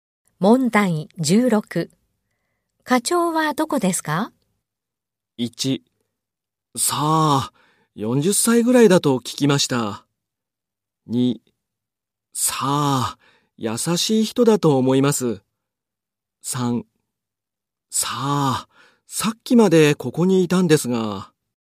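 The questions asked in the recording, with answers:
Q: 課長はどこですか?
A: 2: さあ、さっきまでここにいたんですが。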